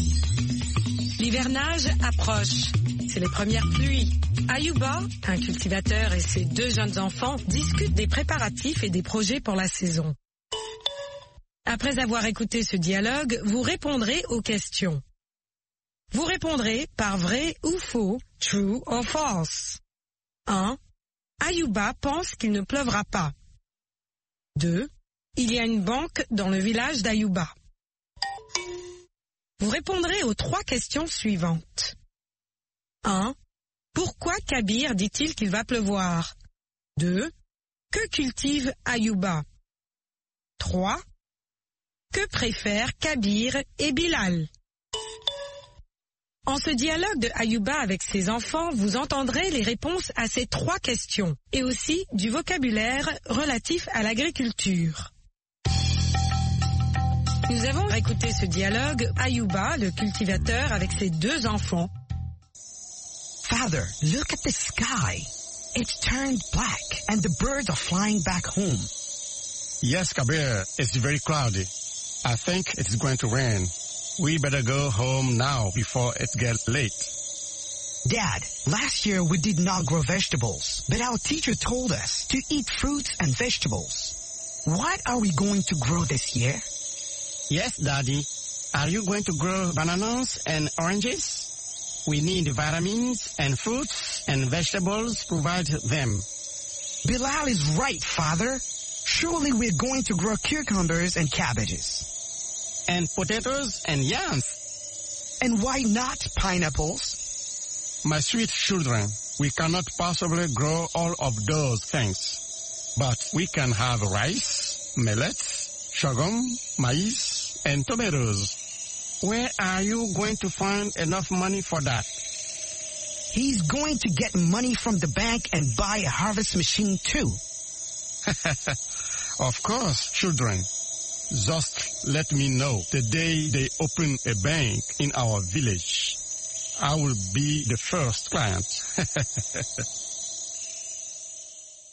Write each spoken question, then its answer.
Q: Ayuba pense qu'il ne pleuvra pas.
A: L'énoncé 1 est faux.

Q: Il y a une banque dans le village d'Ayuba.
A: L'énoncé 2 est faux.

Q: Pourquoi Kabir dit-il qu'il va pleuvoir?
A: Parce que le ciel est nuageux.

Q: Que cultive Ayuba?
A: Ayuba cultive du riz, du mil, du sorgho, du maïs et de la tomate.

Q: Que préfèrent Kabir et Bilal?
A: Ils préfèrent les légumes et des fruits.